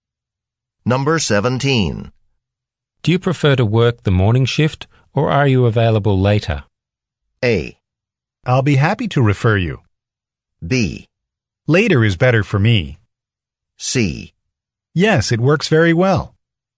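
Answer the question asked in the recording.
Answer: B: Later is better for me.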